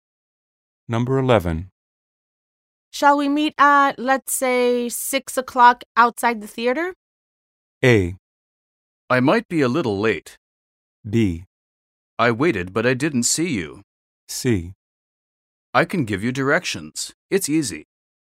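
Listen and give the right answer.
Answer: A: I might be a little late.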